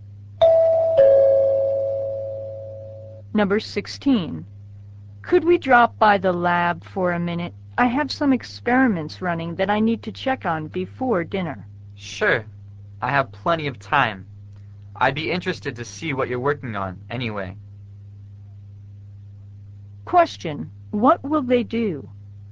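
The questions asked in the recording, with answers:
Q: what will they do?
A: Stop by the lab to check on experiments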